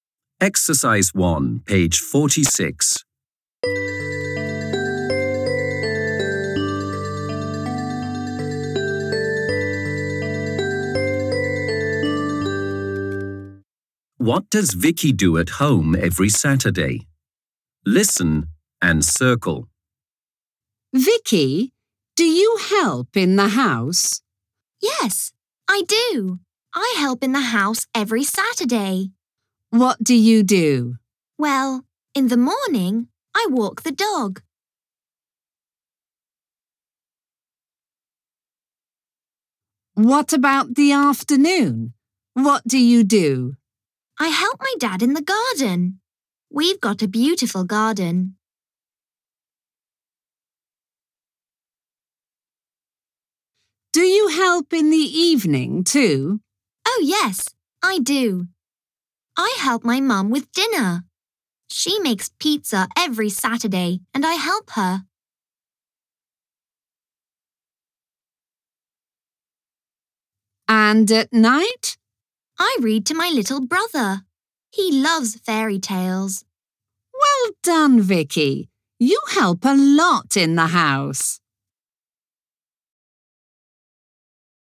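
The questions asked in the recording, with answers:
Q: What does Vicky do at home every Saturday?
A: She walks the dog, helps her dad in the garden, helps her mum with dinner, and reads to her little brother.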